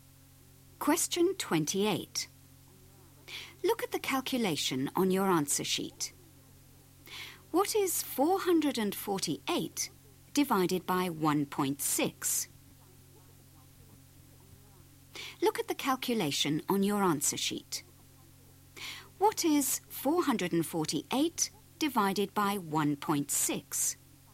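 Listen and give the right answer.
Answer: 280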